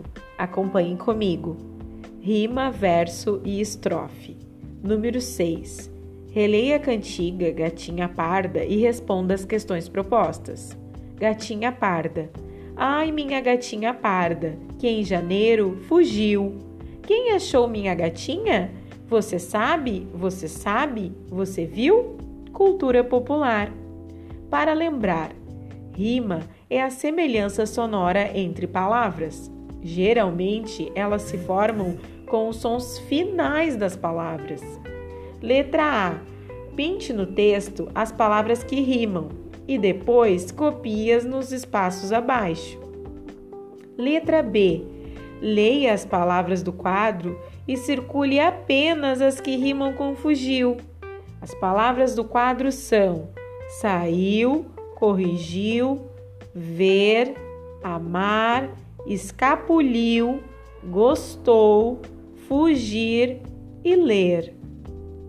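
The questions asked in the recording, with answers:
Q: Leia as palavras do quadro e circule apenas as que rimam com fugiu.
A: saiu, corrigiu, escapuliu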